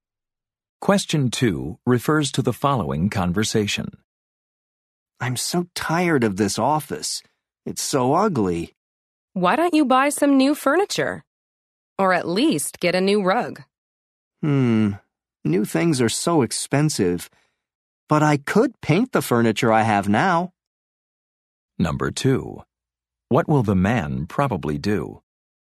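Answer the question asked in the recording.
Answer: Paint his furniture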